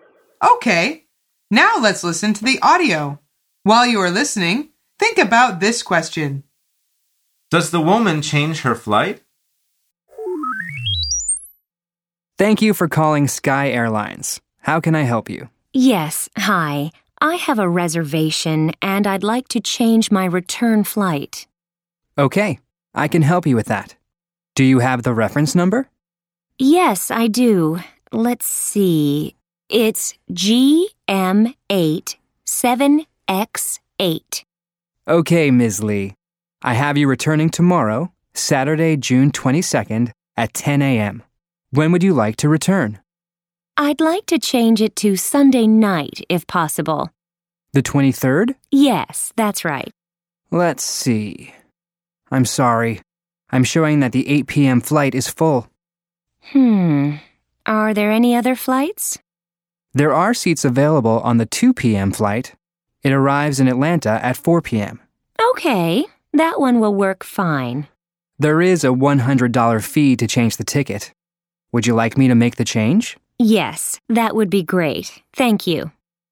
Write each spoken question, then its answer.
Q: Does the woman change her flight?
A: The answer is yes, she does.